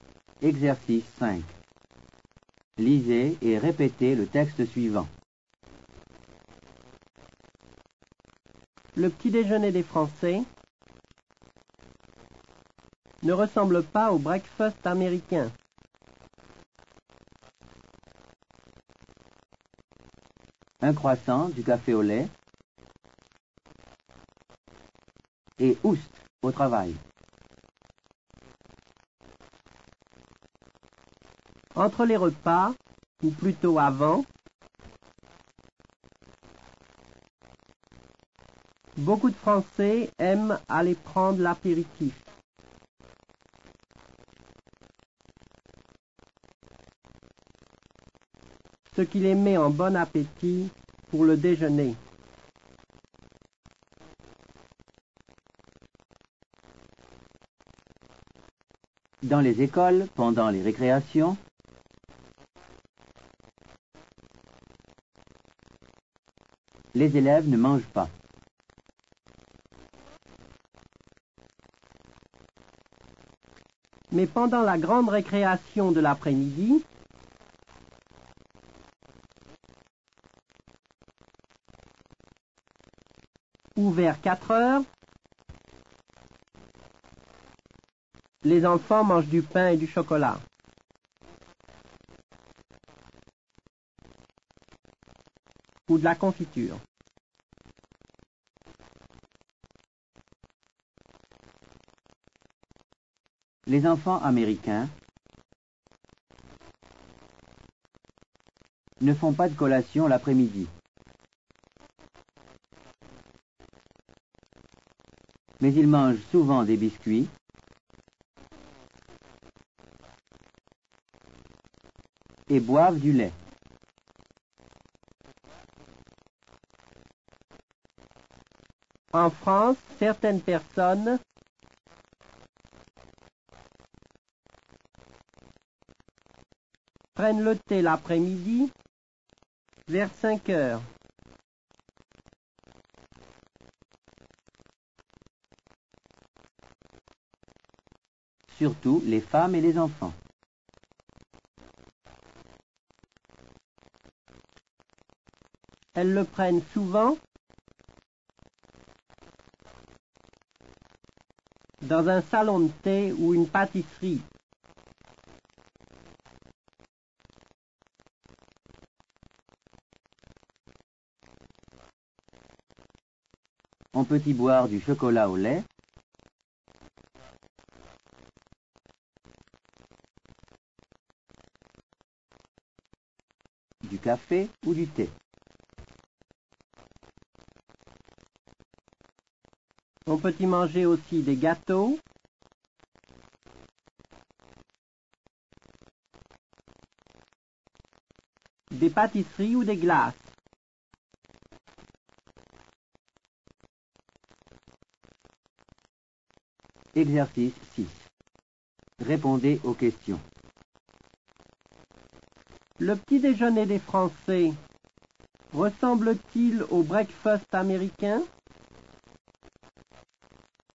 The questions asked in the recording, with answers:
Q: Le petit déjeuner des Français ressemble-t-il au breakfast américain?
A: Non, le petit déjeuner des Français ne ressemble pas au breakfast américain.